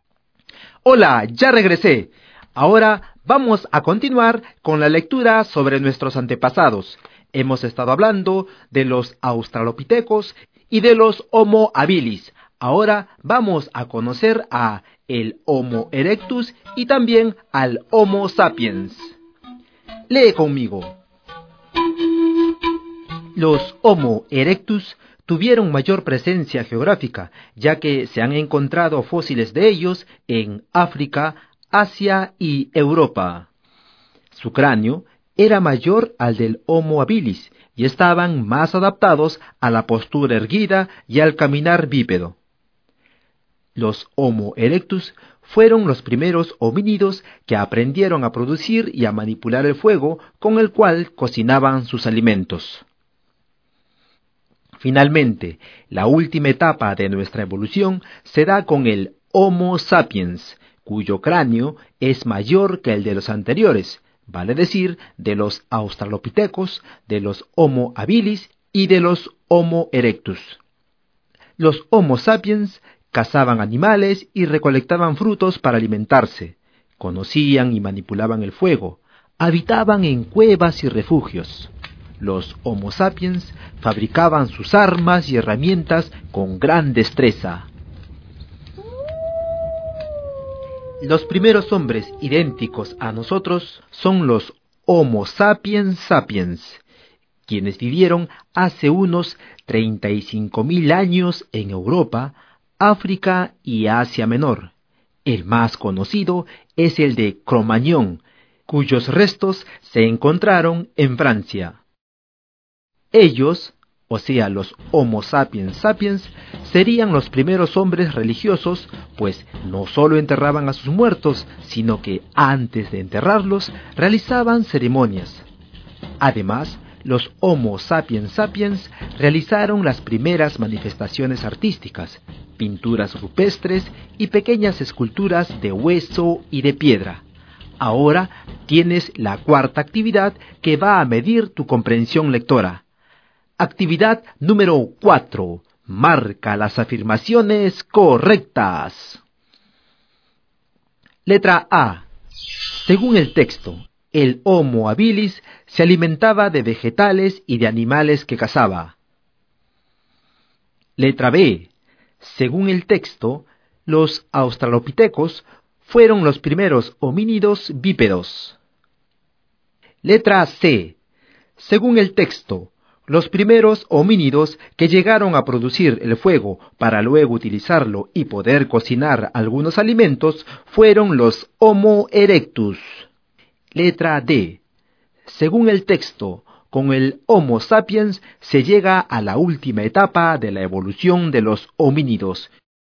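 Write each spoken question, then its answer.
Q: Letra C. Según el texto, los primeros homínidos que llegaron a producir el fuego para luego utilizarlo y poder cocinar algunos alimentos fueron los Homo erectus.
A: Correcta

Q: Letra D. Según el texto, con el Homo sapiens se llega a la última etapa de la evolución de los homínidos.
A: Correcta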